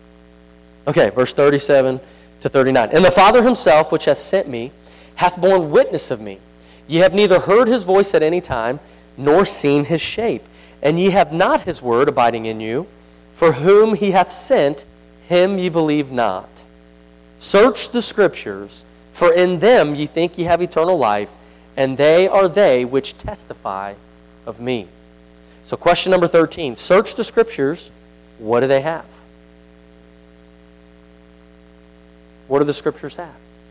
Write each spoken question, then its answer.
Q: search the scriptures, what do they have?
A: Eternal life.